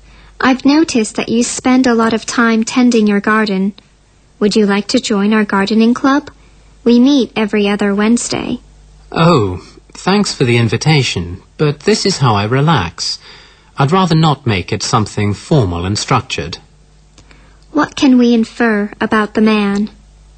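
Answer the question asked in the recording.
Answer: He doesn't want to join the gardening club; gardening is his informal way to relax.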